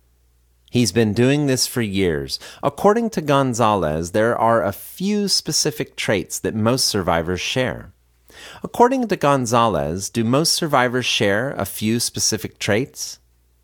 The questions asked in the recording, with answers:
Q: According to Gonzalez, do most survivors share a few specific traits?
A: Yes, according to Gonzalez, most survivors share a few specific traits.